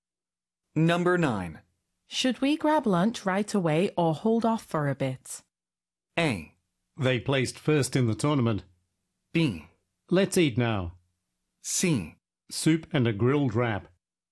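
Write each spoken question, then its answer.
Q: Should we grab lunch right away or hold off for a bit?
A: B: Let's eat now.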